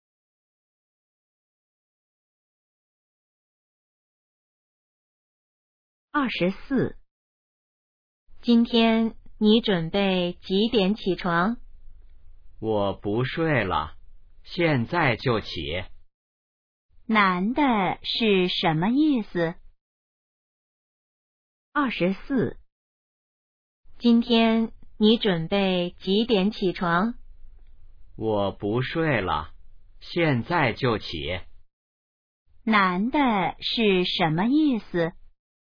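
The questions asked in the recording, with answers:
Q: 男的是什么意思?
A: 他现在就起床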